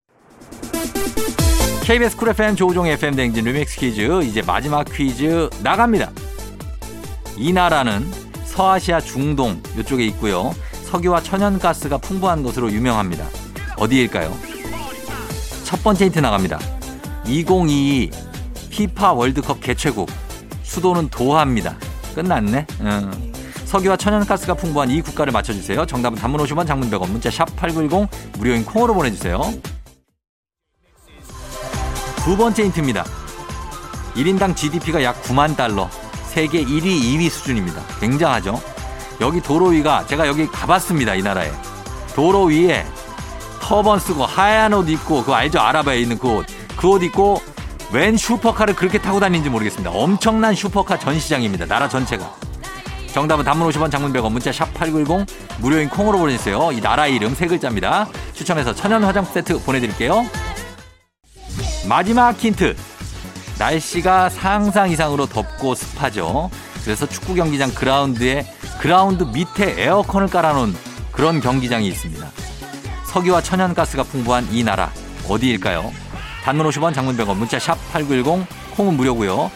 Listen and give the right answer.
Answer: 카타르입니다. 카타르.